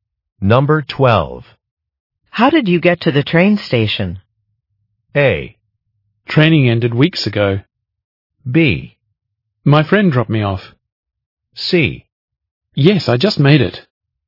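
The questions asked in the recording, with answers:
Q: How did you get to the train station?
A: B: My friend dropped me off.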